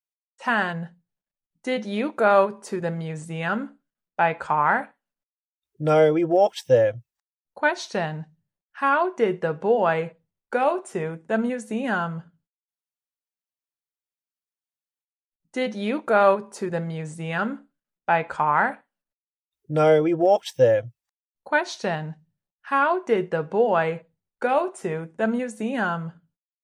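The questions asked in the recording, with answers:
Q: how did the boy go to the museum?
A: He walked there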